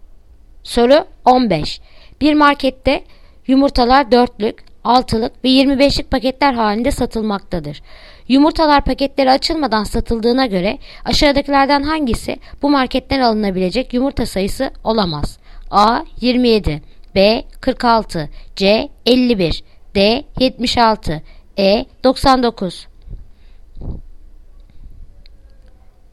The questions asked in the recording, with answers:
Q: Yumurtalar paketleri açılmadan satıldığına göre aşağıdakilerden hangisi bu marketten alınabilecek yumurta sayısı olamaz?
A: Yanıt Adana 27